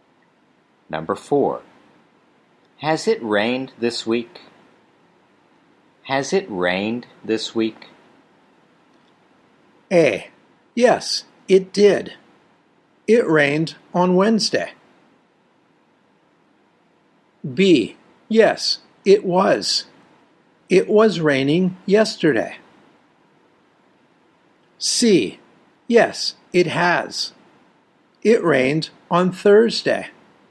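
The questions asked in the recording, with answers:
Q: Has it rained this week?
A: C: Yes, it has. It rained on Thursday.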